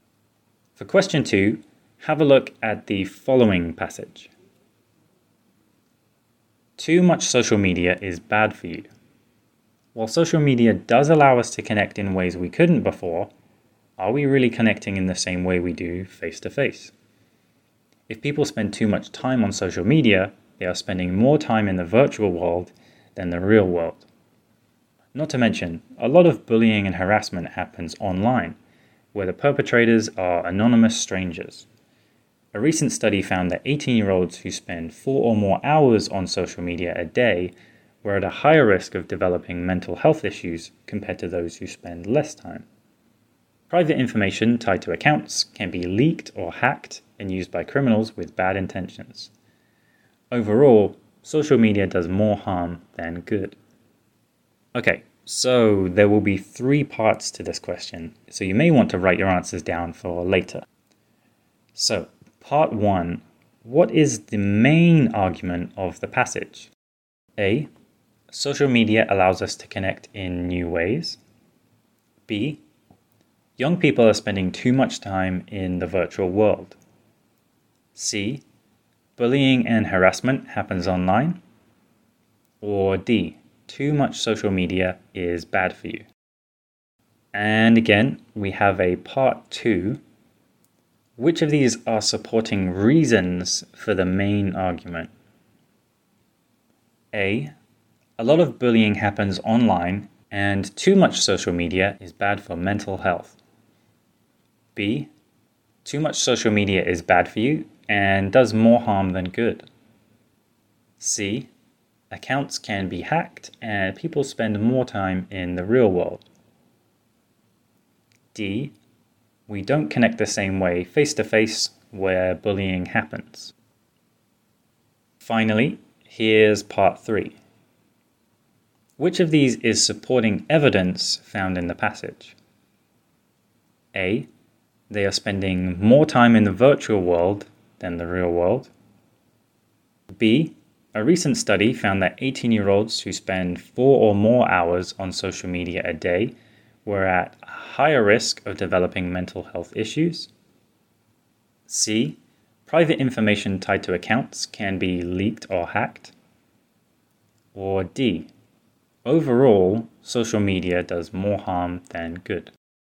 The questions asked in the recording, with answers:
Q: So, part 1. What is the main argument of the passage?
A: So, out of our options in part one, the answer is D.

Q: Which of these are supporting reasons for the main argument?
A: Answer B contains our main argument, so we can say answer A, bullying happens online and too much social media is bad for mental health, is correct, as these are reasons supporting the argument that too much social media is bad for you.

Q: Which of these is supporting evidence found in the passage?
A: Out of all our options here, the best answer is a recent study found that 18-year-olds who spend 4 or more hours on social media a day were at a higher risk of developing mental health issues.